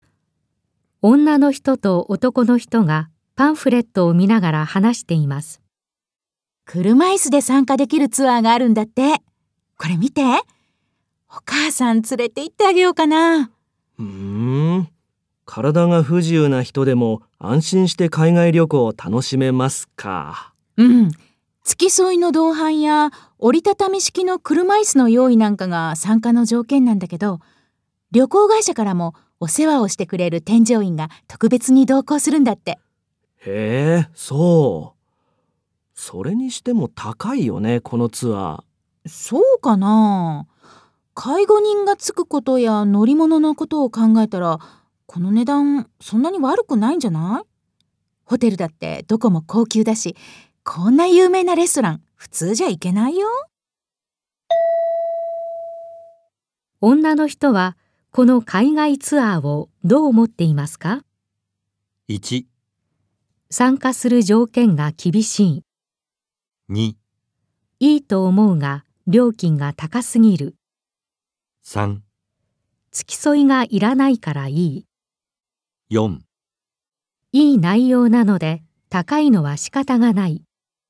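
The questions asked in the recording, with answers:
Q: 女の人はこの海外ツアーをどう思っていますか?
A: 4: いい内容なので高いのは仕方がない。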